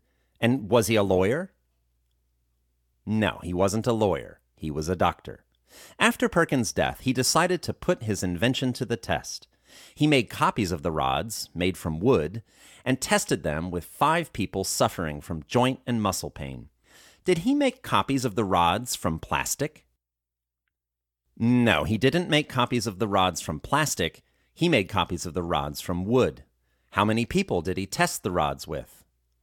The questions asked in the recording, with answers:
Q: How many people did he test the rods with?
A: He tested the rods with five people.